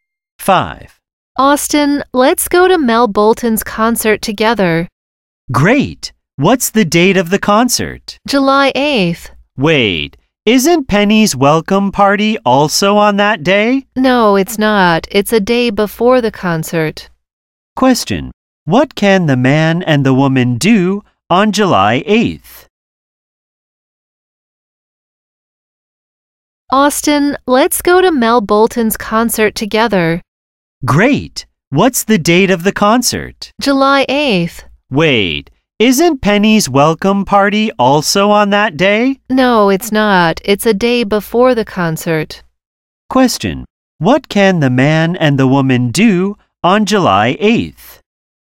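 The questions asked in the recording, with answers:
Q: What can the man and the woman do on July 8th?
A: Go to Mel Bolton's concert together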